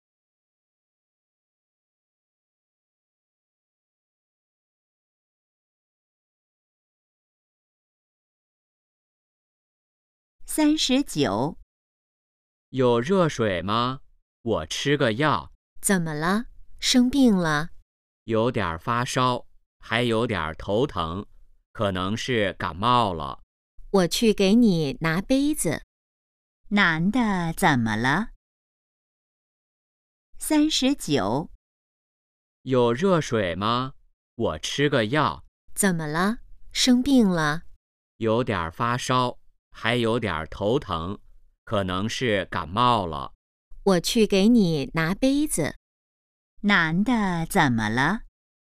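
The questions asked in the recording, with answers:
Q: 男的怎么了?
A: 可能感冒了(发烧、头疼)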